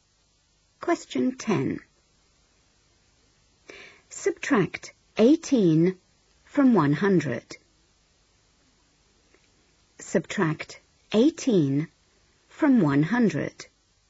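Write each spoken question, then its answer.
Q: Subtract 18 from 100.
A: 82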